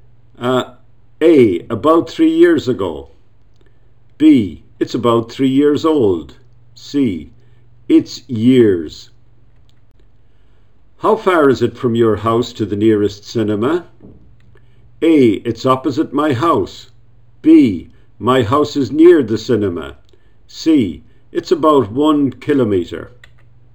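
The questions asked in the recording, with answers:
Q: How far is it from your house to the nearest cinema?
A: C: It's about 1 kilometer.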